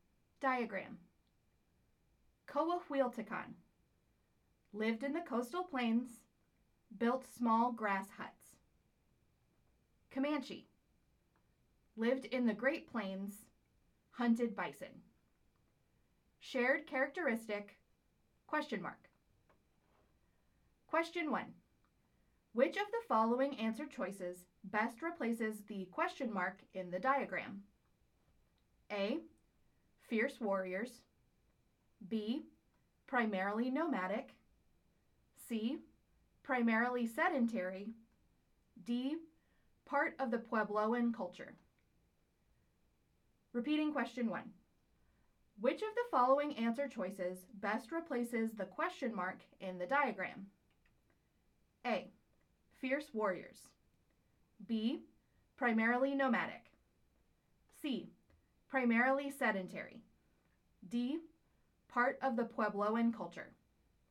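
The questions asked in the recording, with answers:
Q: Which of the following answer choices best replaces the ? In the diagram?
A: B: Primarily nomadic.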